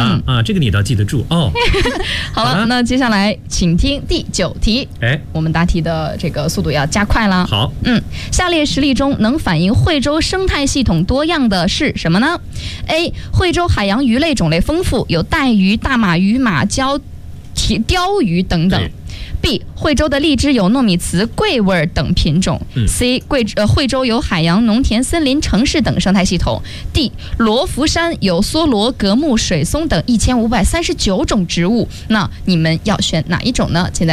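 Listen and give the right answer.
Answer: C: 惠州有海洋、农田、森林、城市等生态系统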